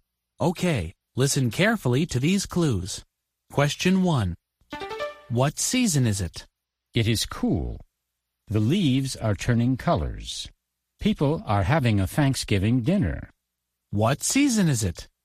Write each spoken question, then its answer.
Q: What season is it?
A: That's right, it's fall.